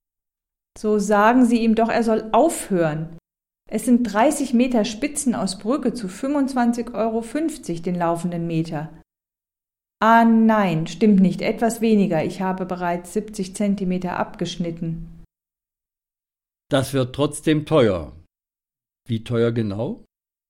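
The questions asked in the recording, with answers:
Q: Das wird trotzdem teuer. Wie teuer genau?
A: 747,15 Euro (29,30 m × 25,50 Euro)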